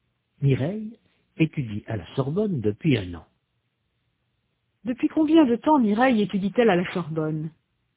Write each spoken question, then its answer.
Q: Depuis combien de temps Mireille étudie-t-elle à la Sorbonne?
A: Depuis un an.